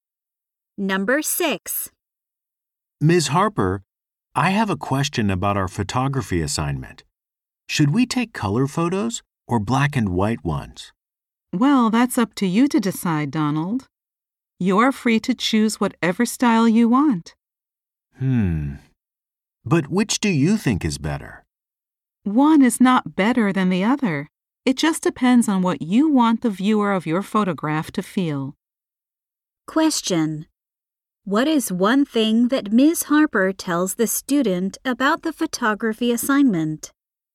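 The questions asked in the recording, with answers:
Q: What is one thing that Ms. Harper tells the student about the photography assignment?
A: He can choose color or black and white; neither is better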